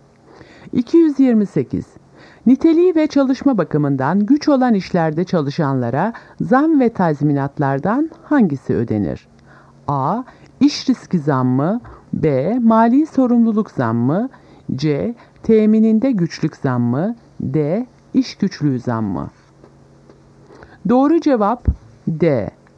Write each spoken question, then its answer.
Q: Niteliği ve çalışma bakımından güç olan işlerde çalışanlara zam ve tazminatlardan hangisi ödenir?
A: Doğru cevap D. İş güçlüğü zammı.